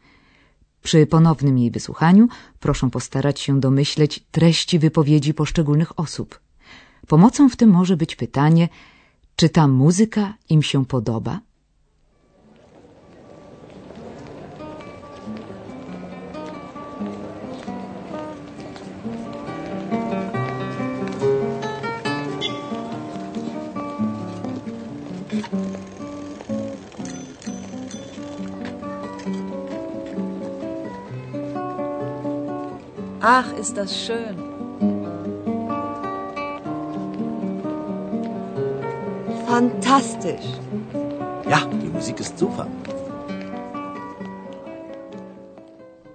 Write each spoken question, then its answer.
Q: Pomocą w tym może być pytanie, czy ta muzyka im się podoba?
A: Pierwsza kobieta wydaje się być zachwycona.